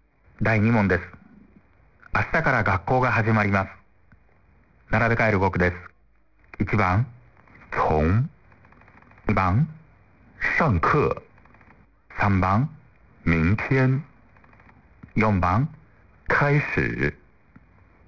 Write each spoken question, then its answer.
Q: 第2問です。明日から学校が始まります。並べ替える語句です。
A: 1、3、4、2の順でした。